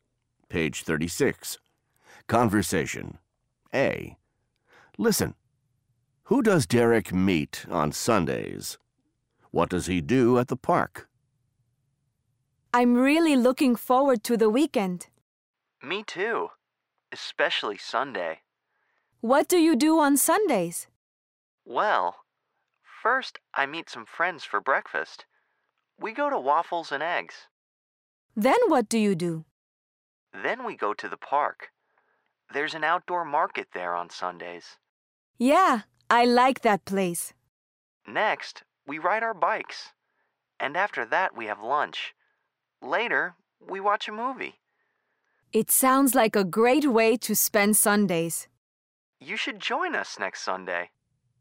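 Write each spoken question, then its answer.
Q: Who does Derek meet on Sundays?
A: Some friends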